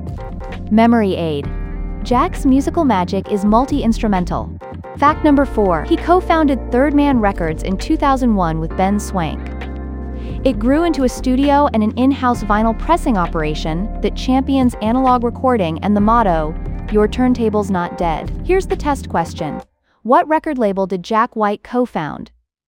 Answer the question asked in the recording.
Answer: Correct answer, Third Man Records.